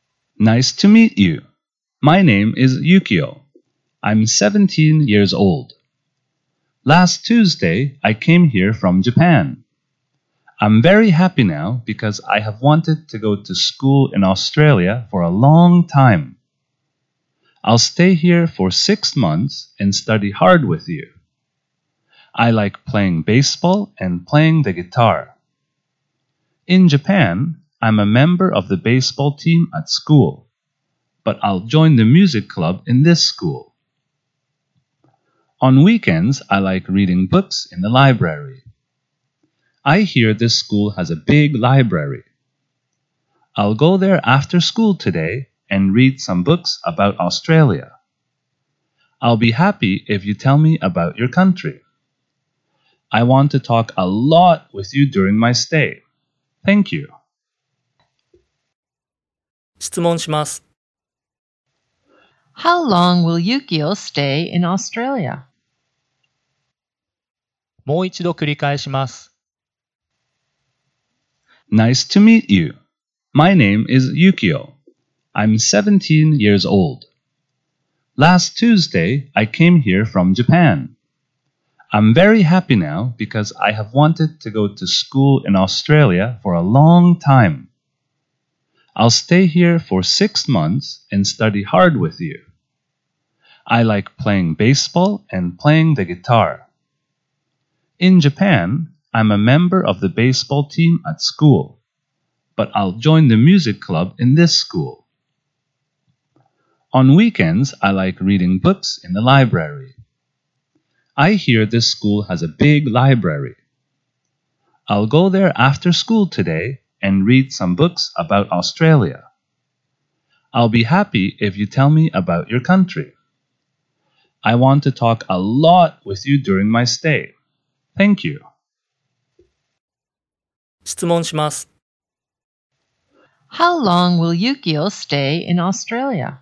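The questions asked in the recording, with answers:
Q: How long will Yukio stay in Australia?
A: For six months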